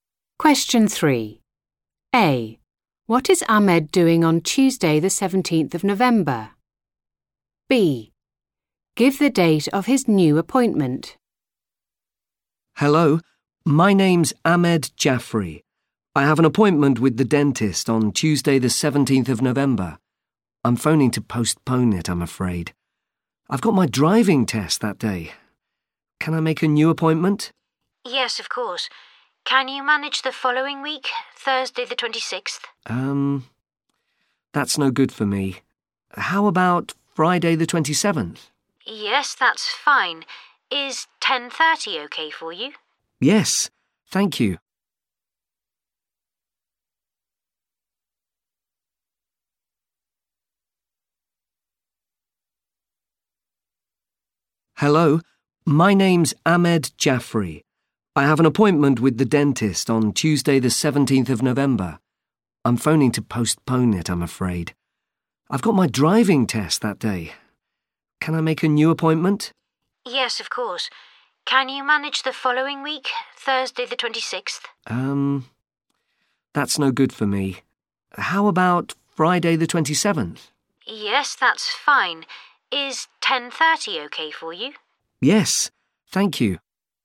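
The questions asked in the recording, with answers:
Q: What is Ahmed doing on Tuesday, the 17th of November?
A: Taking his driving test

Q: Give the date of his new appointment.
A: Friday 27th November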